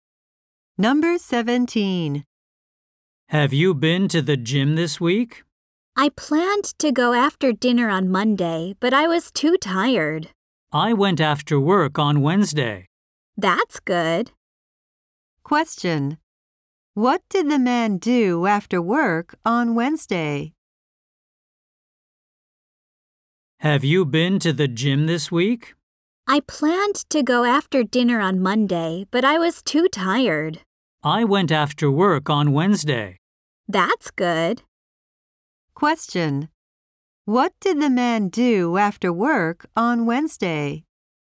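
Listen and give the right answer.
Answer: He went to the gym.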